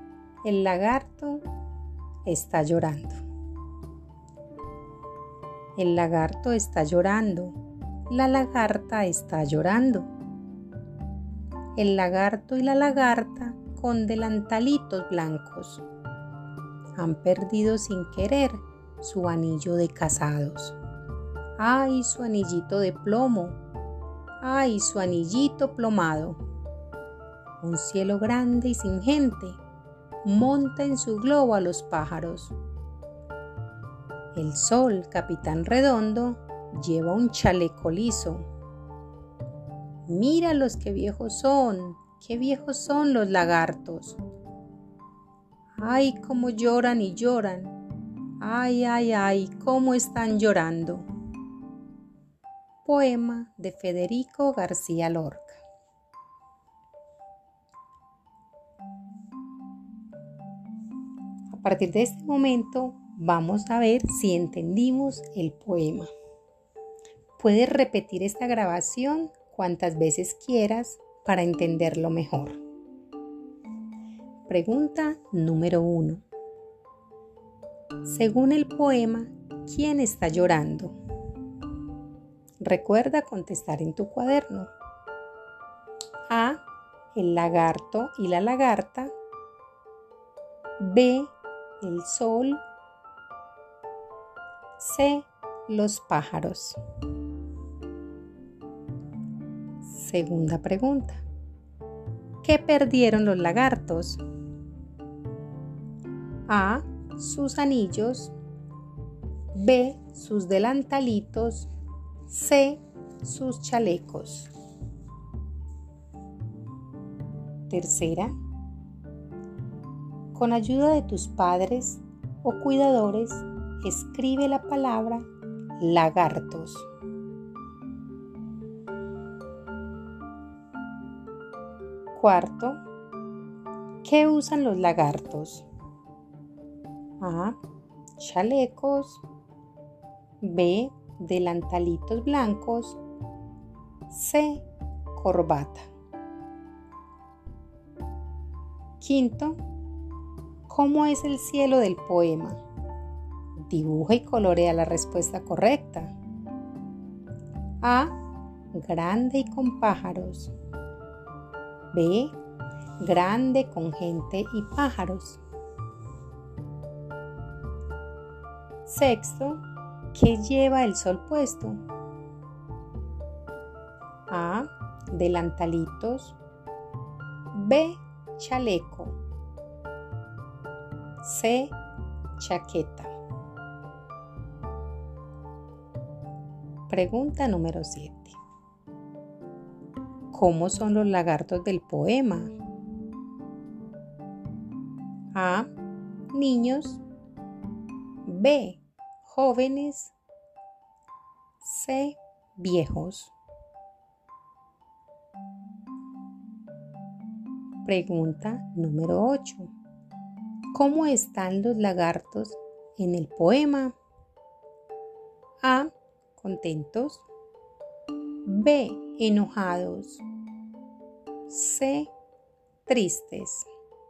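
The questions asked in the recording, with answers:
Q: Según el poema, ¿quién está llorando?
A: A: El lagarto y la lagarta.

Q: ¿Qué perdieron los lagartos?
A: A: Sus anillos.

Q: ¿qué usan los lagartos?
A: B: Delantalitos blancos.

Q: ¿qué lleva el sol puesto?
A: B: Chaleco.

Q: ¿Cómo son los lagartos del poema?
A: C: Viejos.

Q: ¿Cómo están los lagartos en el poema?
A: C: Tristes.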